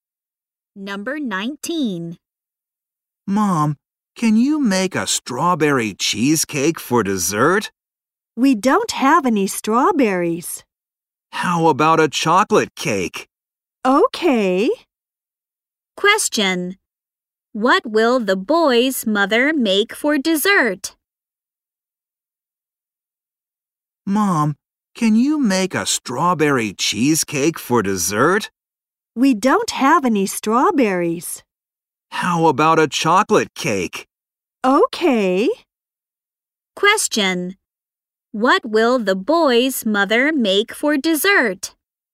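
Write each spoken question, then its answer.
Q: Question. What will the boy's mother make for dessert?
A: A chocolate cake.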